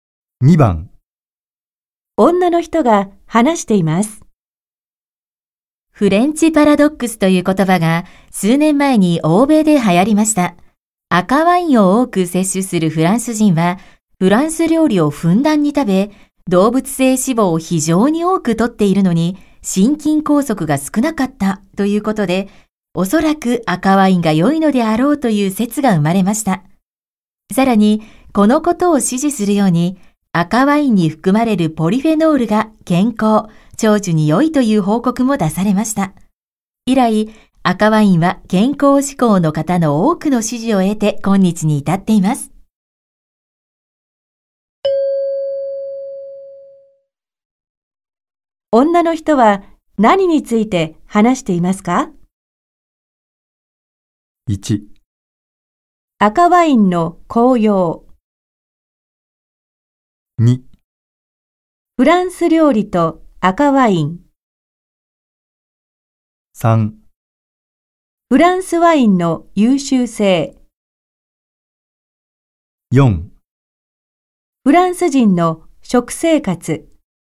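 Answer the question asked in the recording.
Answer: 1: 赤ワインの紅葉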